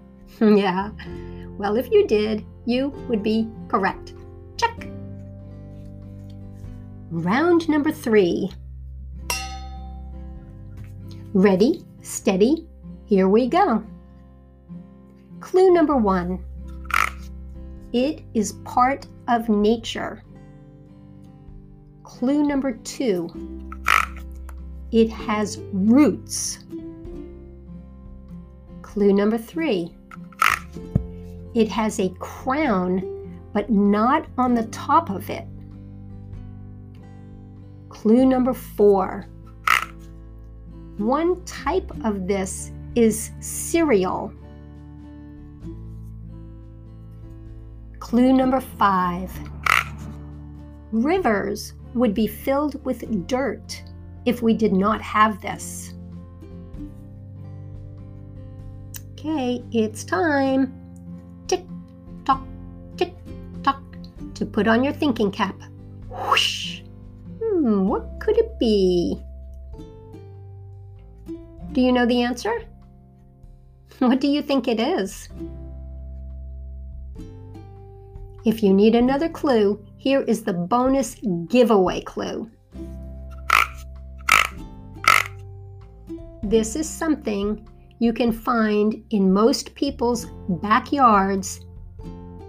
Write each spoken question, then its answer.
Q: What could it be?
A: Did you say grass?